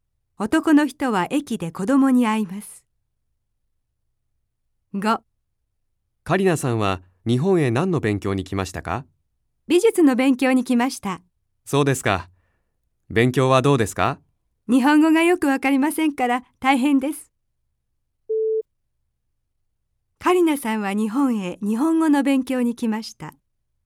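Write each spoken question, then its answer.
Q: カリナさんは日本へ日本語の勉強に来ました。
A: ×(美術の勉強)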